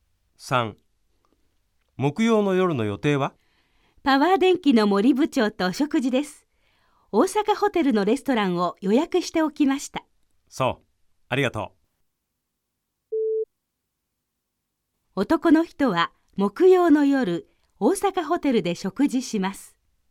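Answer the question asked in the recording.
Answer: 〇(正しい)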